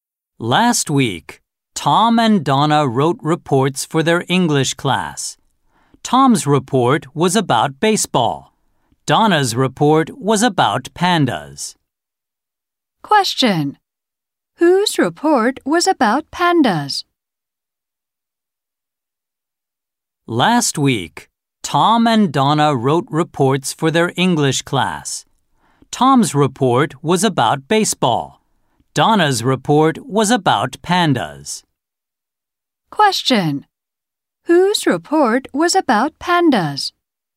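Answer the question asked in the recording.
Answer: Donna's.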